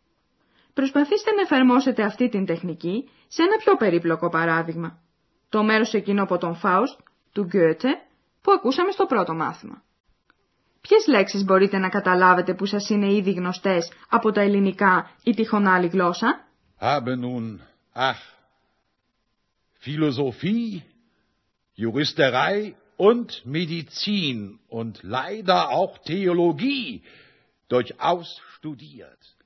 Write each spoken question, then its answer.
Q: Ποιες λέξεις μπορείτε να καταλάβετε που σας είναι ήδη γνωστές από τα ελληνικά ή τυχόν άλλη γλώσσα?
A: Μπορέσατε να διακρίνετε λέξεις όπως φιλοσοφία, φιλοσοφία, ιατρική, μεντιτσίν, θεολογία, θεολογία.